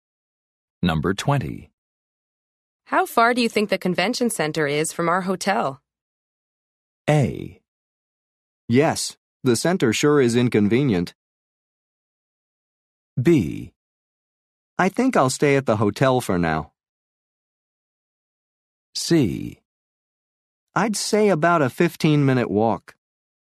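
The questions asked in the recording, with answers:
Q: How far do you think the convention center is from our hotel?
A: C: I'd say about a 15-minute walk.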